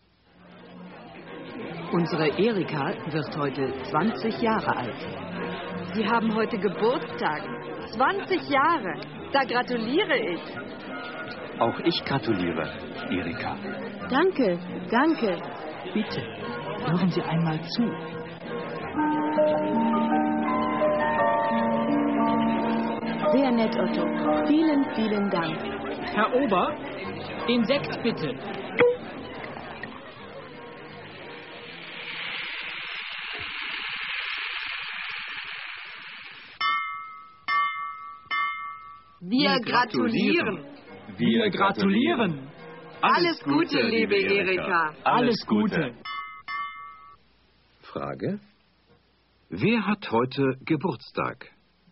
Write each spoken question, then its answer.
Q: Wer hat heute Geburtstag?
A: Erika hat heute Geburtstag.